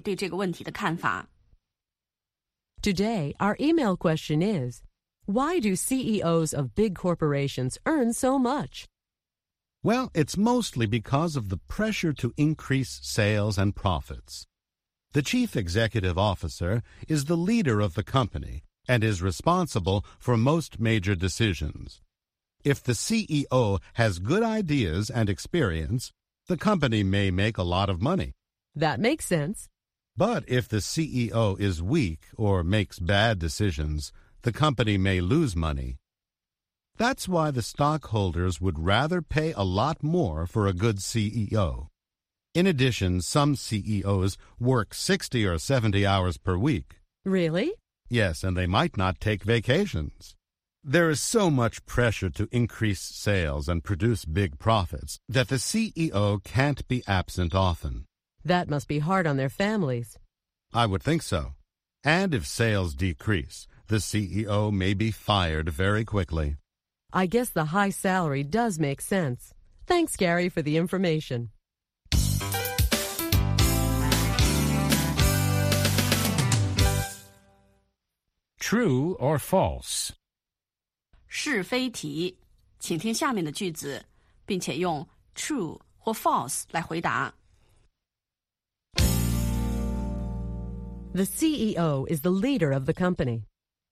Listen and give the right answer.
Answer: True. The chief executive officer is responsible for most major decisions.